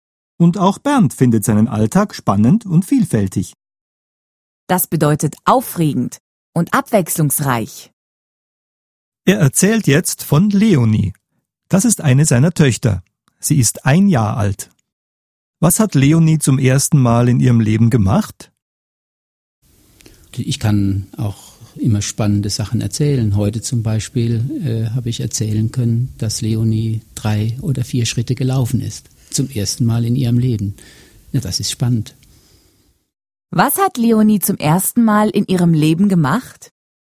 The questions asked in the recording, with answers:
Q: Was hat Leonie zum ersten Mal in ihrem Leben gemacht?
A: Sie ist zum ersten Mal in ihrem Leben gelaufen.